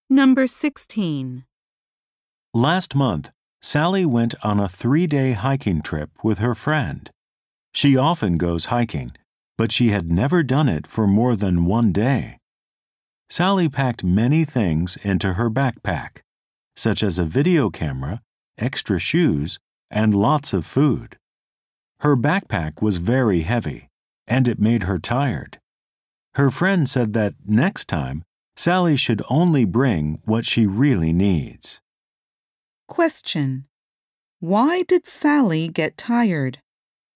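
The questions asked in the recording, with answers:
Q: Why did Sally get tired?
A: Her backpack was very heavy.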